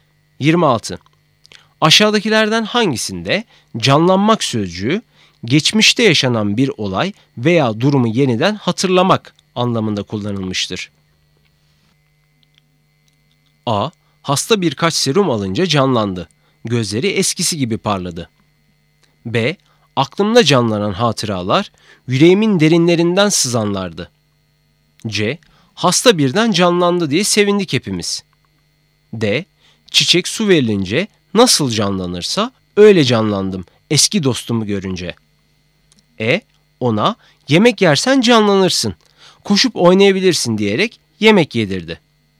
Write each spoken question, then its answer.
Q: Aşağıdakilerden hangisinde canlanmak sözcüğü geçmişte yaşanan bir olay veya durumu yeniden hatırlamak anlamında kullanılmıştır?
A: Doğru cevap B. Aklımda canlanan hatıralar yüreğimin derinlerinden sızanlardı.